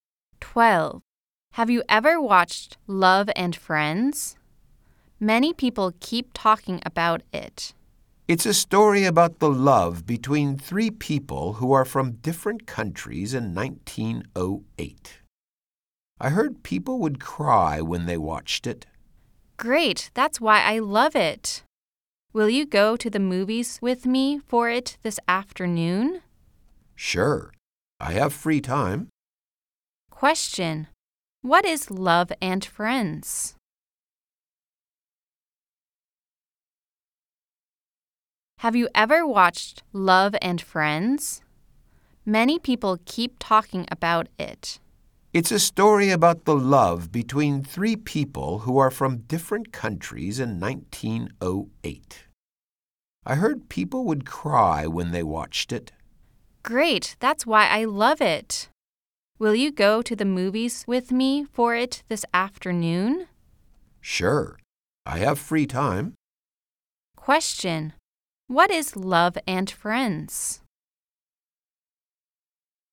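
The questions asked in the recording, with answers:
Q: Question, what is Love and Friends?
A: A movie: a love story about three people from different countries in 1908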